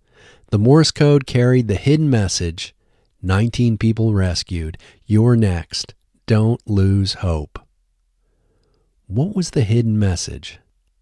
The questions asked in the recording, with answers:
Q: What was the hidden message?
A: The hidden message was, 19 people rescued, you're next, don't lose hope.